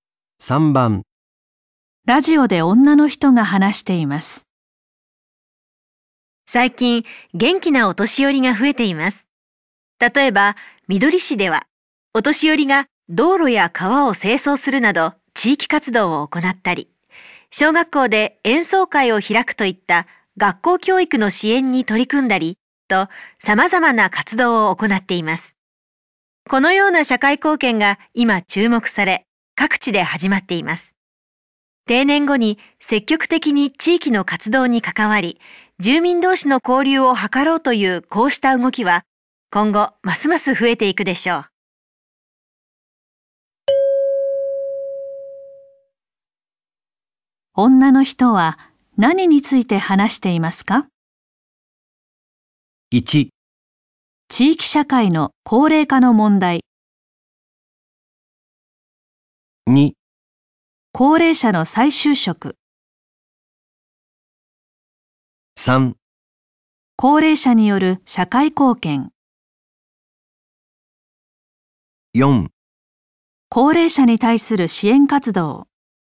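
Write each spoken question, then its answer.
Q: 女の人は何について話していますか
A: 3: 高齢者による社会貢献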